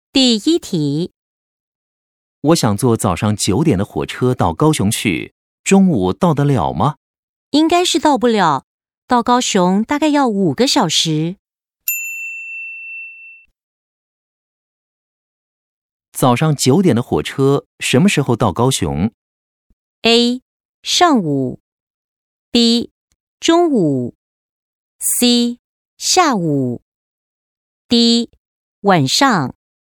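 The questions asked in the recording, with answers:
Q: 早上九点的火车什么时候到高雄?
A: C: 下午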